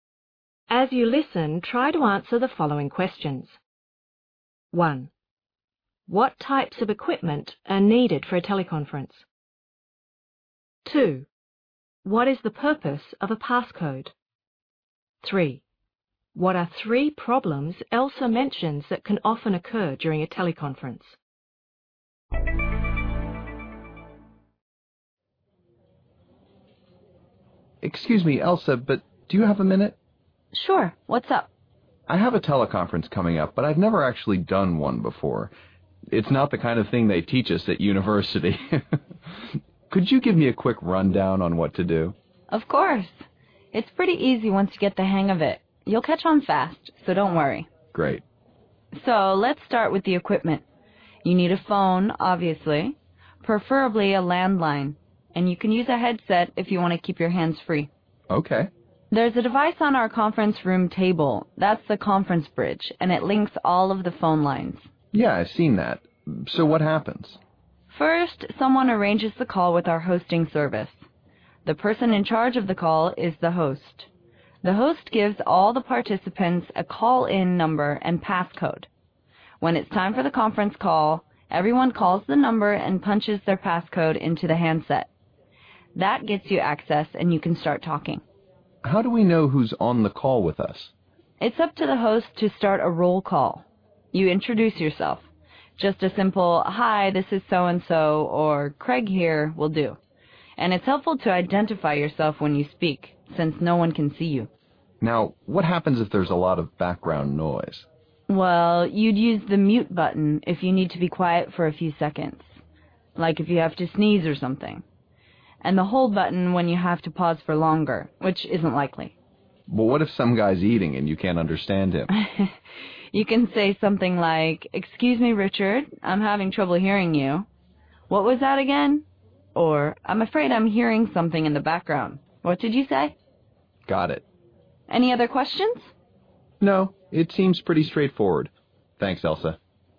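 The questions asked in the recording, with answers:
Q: What types of equipment are needed for a teleconference?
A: A phone (preferably a landline), optionally a headset, and a conference bridge

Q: What is the purpose of a passcode?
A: It gets you access to the conference call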